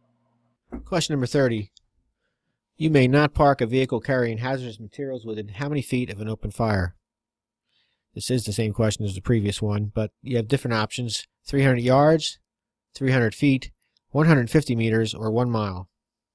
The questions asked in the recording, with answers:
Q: You may not park a vehicle carrying hazardous materials within how many feet of an open fire?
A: The answer, if you recall, is B, 300 feet.